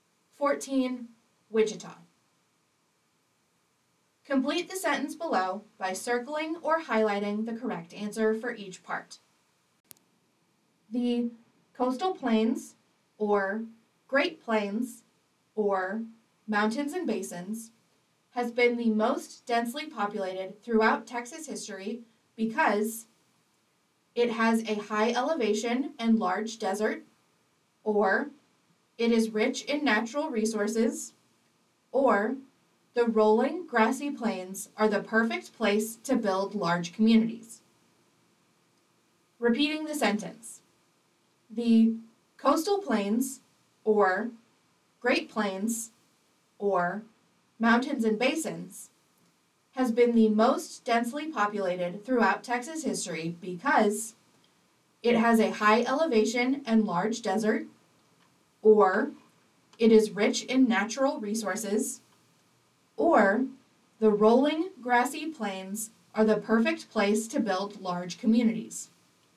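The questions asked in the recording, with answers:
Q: The coastal plains, or Great Plains, or mountains and basins, has been the most densely populated throughout Texas history because it has a high elevation and large desert, or it is rich in natural resources, or the rolling grassy plains are the perfect place to build large communities.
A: The coastal plains; it is rich in natural resources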